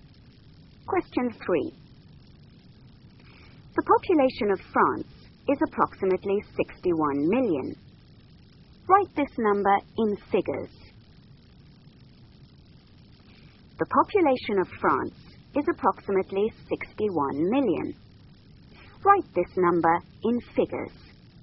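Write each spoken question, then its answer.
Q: The population of France is approximately 61 million. Write this number in figures.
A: 61,000,000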